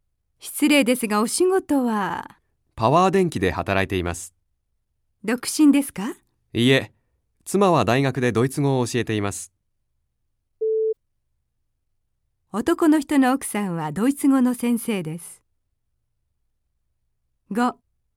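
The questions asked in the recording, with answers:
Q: 男の人の奥さんはドイツ語の先生です。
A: 正しい(○)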